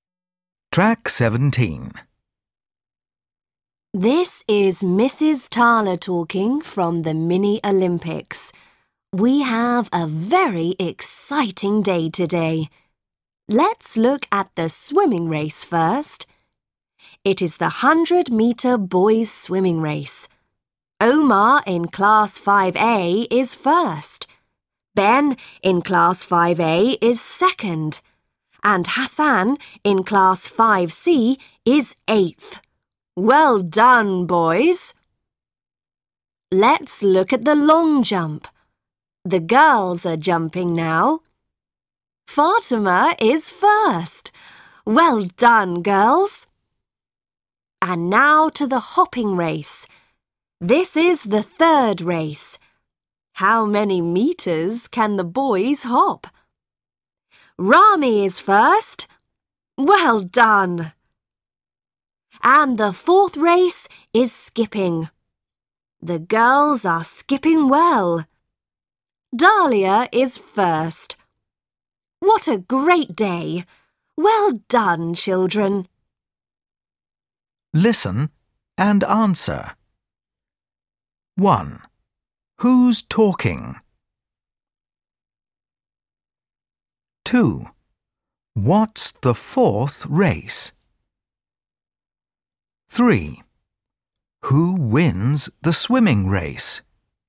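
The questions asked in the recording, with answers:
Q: Who's talking?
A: Mrs. Tala

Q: What's the fourth race?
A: skipping

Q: Who wins the swimming race?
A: Omar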